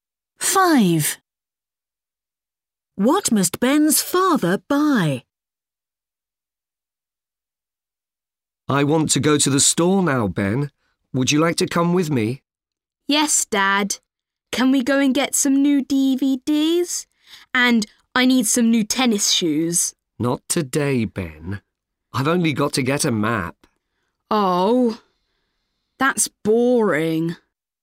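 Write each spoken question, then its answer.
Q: What must Ben's father buy?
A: A map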